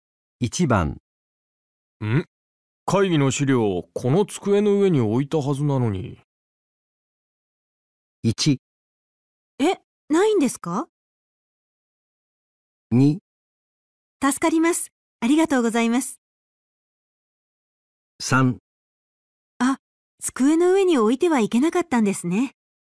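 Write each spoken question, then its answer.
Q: 会議の資料、この机の上に置いたはずなのに。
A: 1: え、ないんですか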